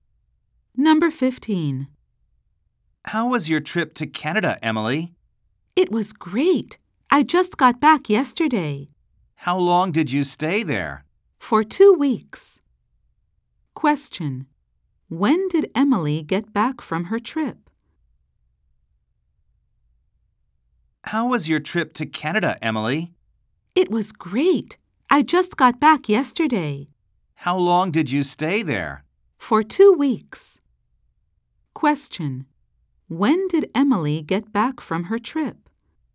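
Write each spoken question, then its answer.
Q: When did Emily get back from her trip?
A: Yesterday.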